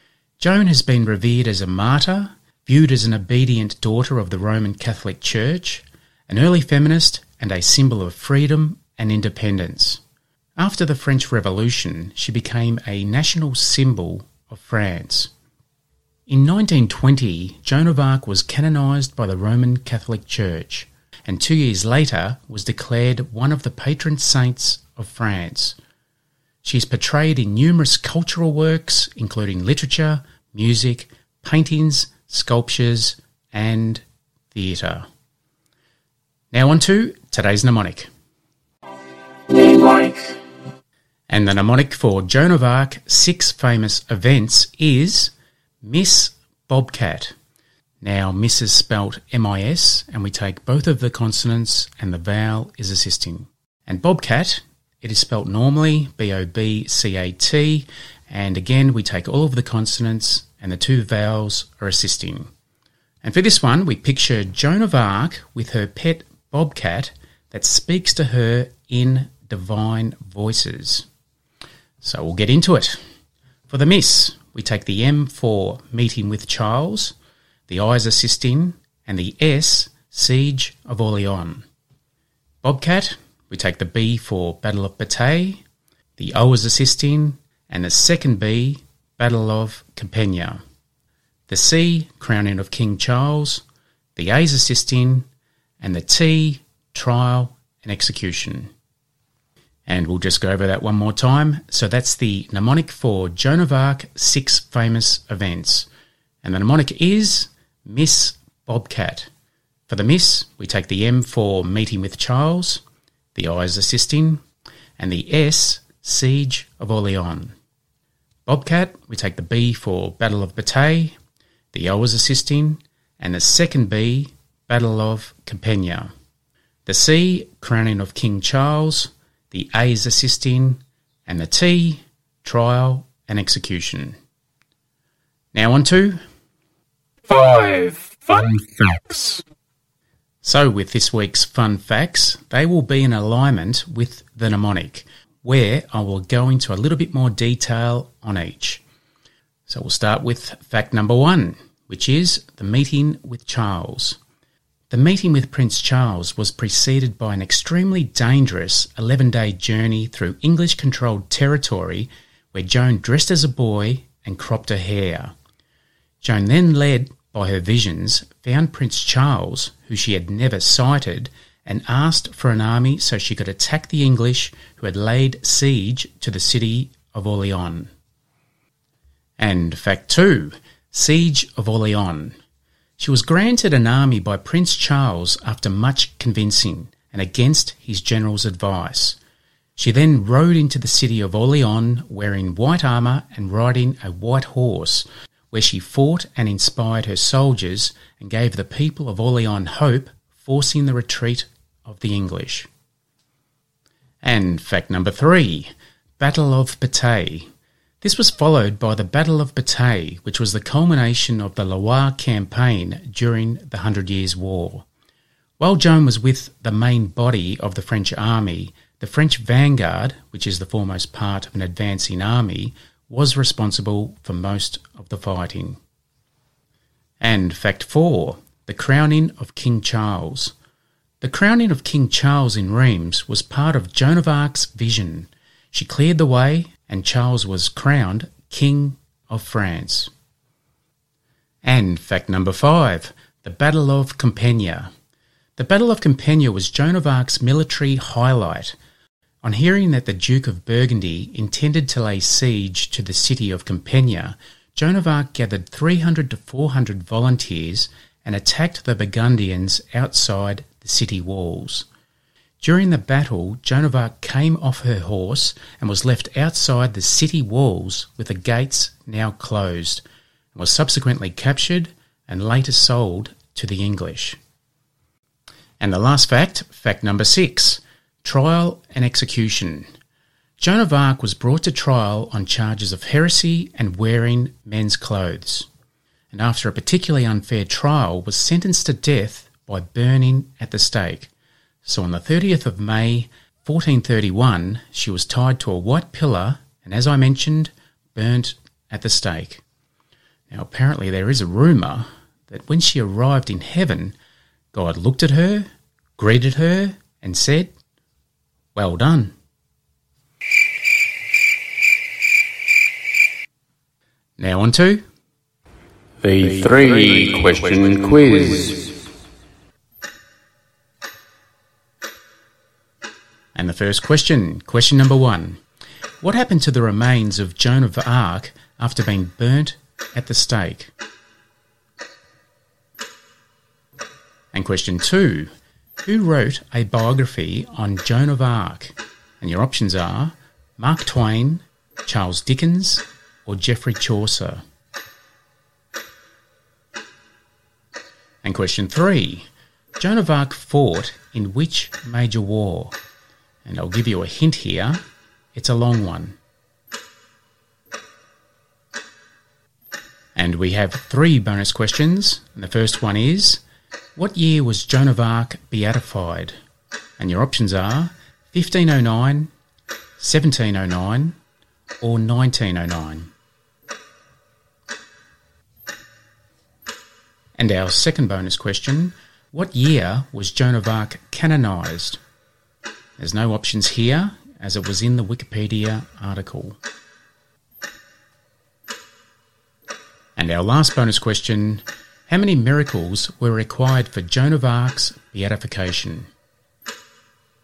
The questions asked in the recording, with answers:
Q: Joan of Arc fought in which major war?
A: And the major war that Joan of Arc fought in was the Hundred Years' War.

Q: what year was Joan of Arc canonized?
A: And Joan of Arc was canonized in 1920 by Pope Benedict XV.